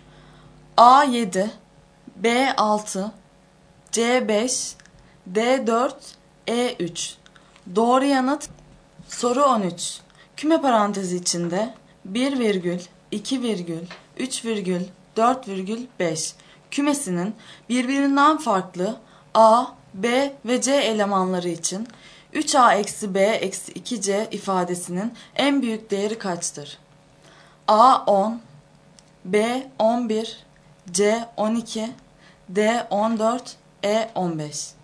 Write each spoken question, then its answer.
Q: Kümesinin birbirinden farklı A, B ve C elemanları için 3A eksi B eksi 2C ifadesinin en büyük değeri kaçtır?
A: Doğru yanıt B şıkkı.